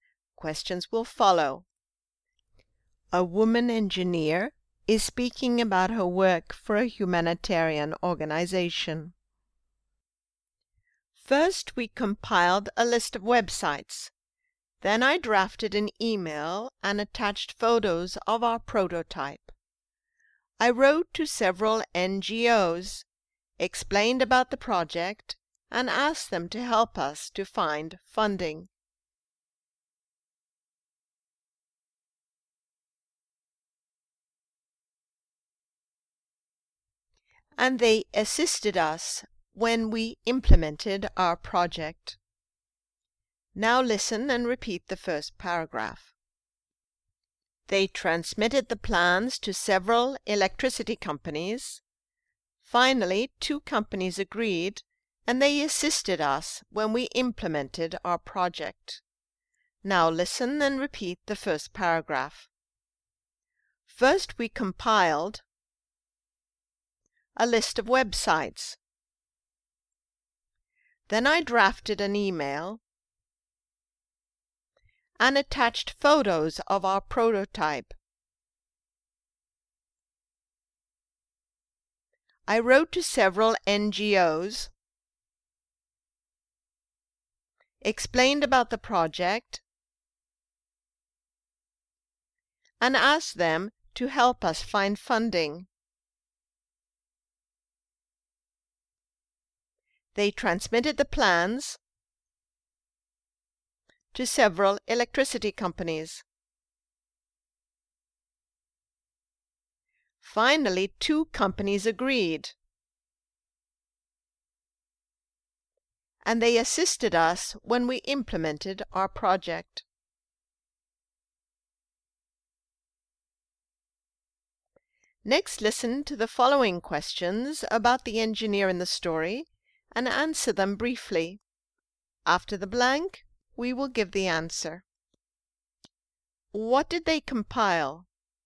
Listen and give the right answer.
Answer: They compiled a list of websites.